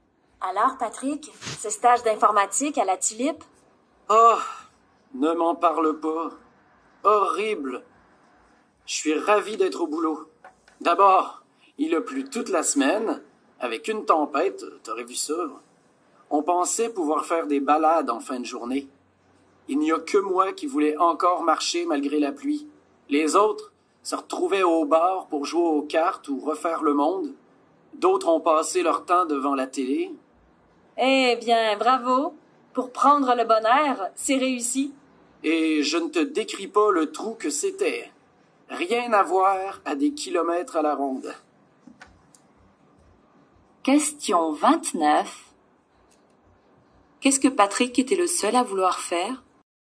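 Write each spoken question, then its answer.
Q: Qu'est-ce que Patrick était le seul à vouloir faire?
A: Se promener (marcher) malgré la pluie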